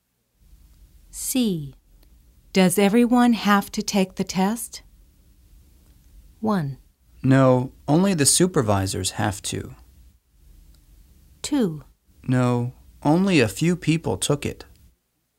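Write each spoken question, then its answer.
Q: Does everyone have to take the test?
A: 1: No, only the supervisors have to.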